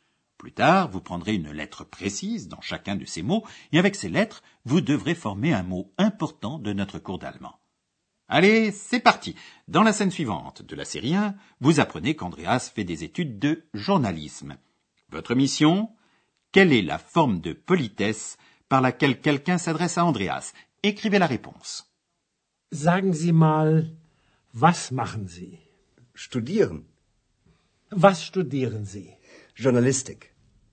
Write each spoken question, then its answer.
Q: Votre mission Quelle est la forme de politesse par laquelle quelqu'un s'adresse à Andreas Écrivez la réponse.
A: Ce mot est zi, vous.